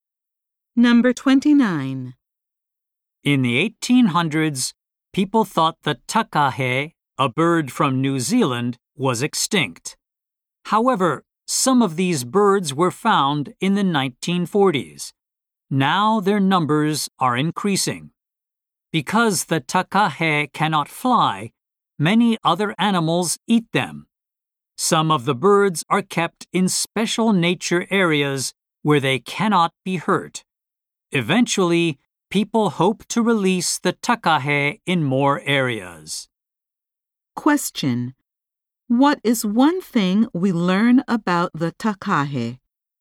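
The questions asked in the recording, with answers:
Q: What is one thing we learn about the takahe?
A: It cannot fly, and its numbers are increasing.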